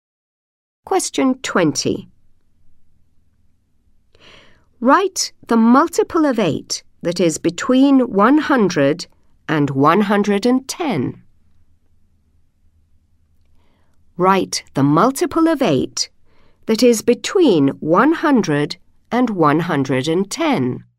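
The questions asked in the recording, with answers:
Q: Write the multiple of 8 that is between 100 and 110.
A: 104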